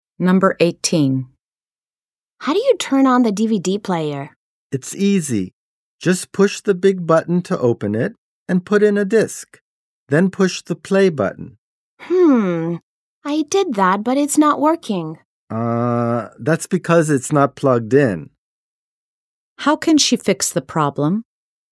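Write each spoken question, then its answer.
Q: How can she fix the problem?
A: Plug in the DVD player.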